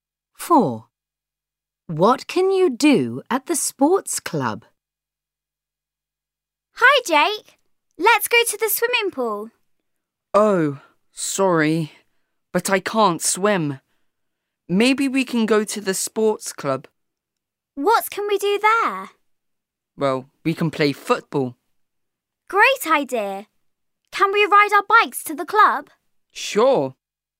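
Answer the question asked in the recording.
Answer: play football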